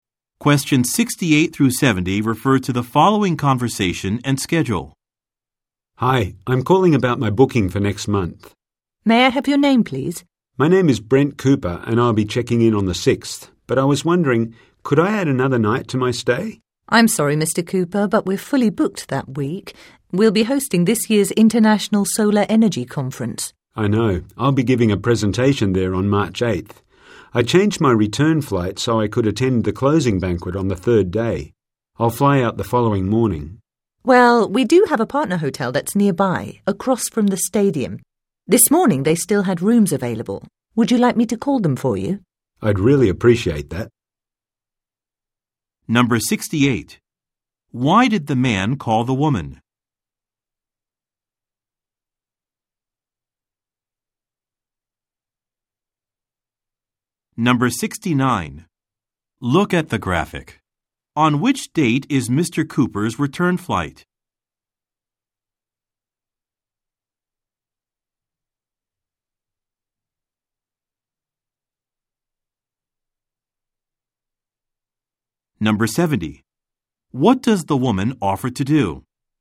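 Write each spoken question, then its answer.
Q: Why did the man call the woman?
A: To add another night to his hotel stay

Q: What does the woman offer to do?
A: Call a nearby partner hotel for him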